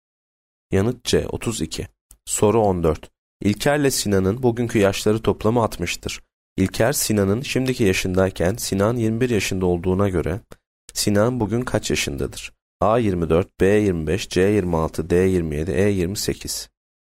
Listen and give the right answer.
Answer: Yanıt D 27.